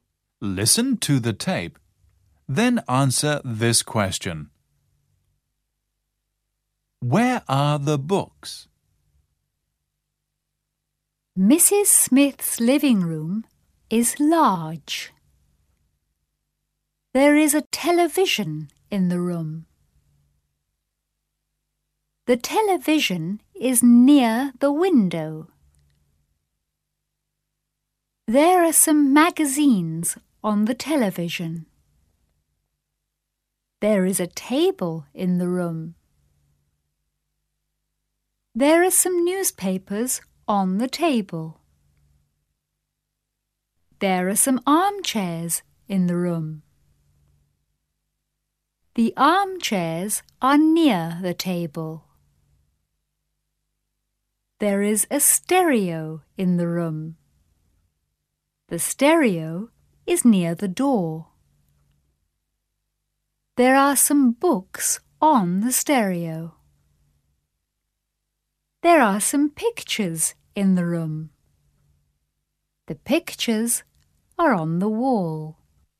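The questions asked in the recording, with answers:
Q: Where are the books?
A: On the stereo.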